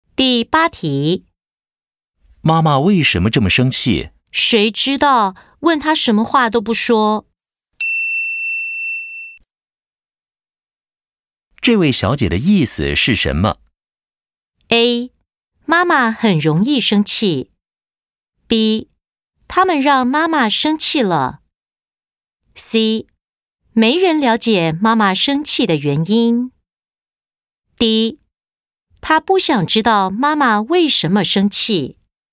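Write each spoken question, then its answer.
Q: 这位小姐的意思是什么?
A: C: 没人了解妈妈生气的原因。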